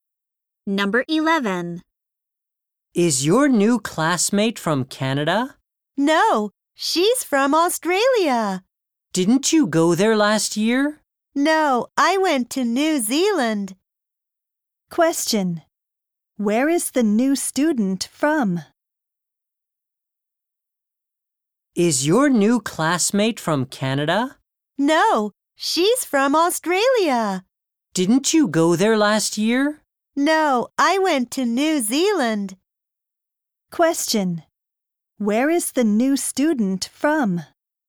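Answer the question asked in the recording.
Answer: Australia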